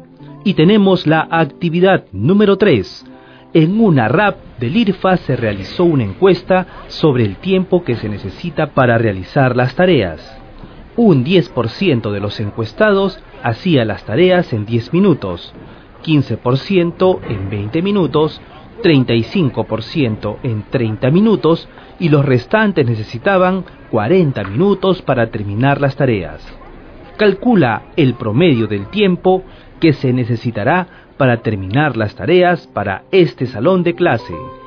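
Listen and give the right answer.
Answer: 30,5 minutos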